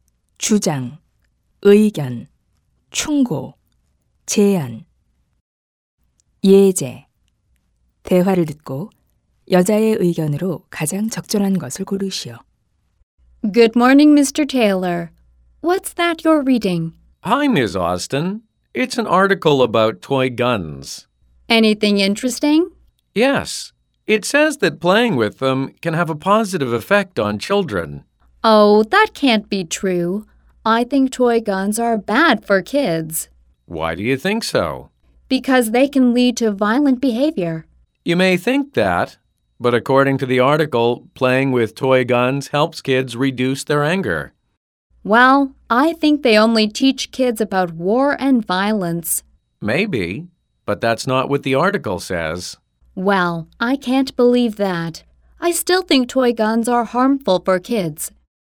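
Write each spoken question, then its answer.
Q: 대화를 듣고 여자의 의견으로 가장 적절한 것을 고르시오.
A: 장난감 총은 아이들에게 해롭다.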